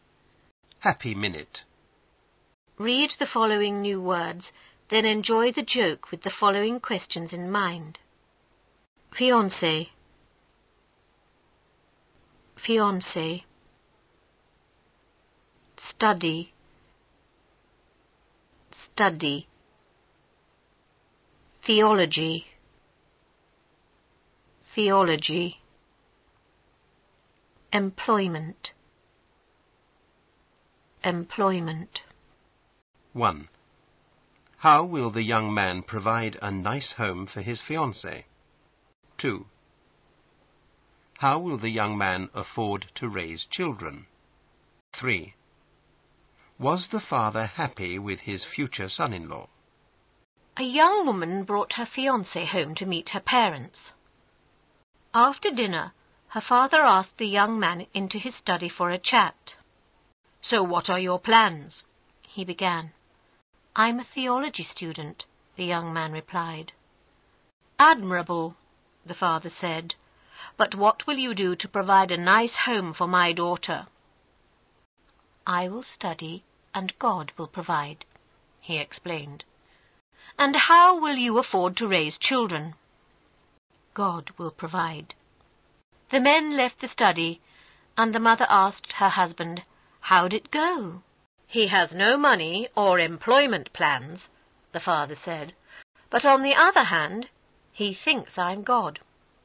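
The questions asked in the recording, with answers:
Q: How will the young man provide a nice home for his fiancée?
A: He will study and God will provide

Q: How will the young man afford to raise children?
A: God will provide

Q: Was the father happy with his future son-in-law?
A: No, he has no money or employment plans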